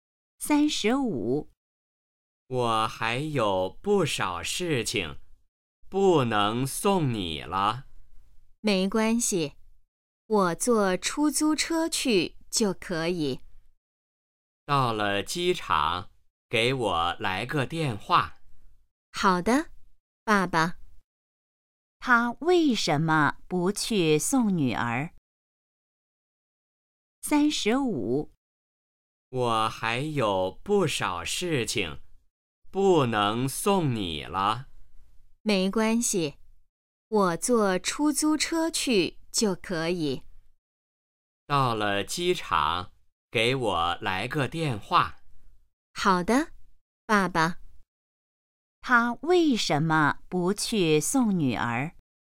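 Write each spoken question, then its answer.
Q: 他为什么不去送女儿?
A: 他还有不少事情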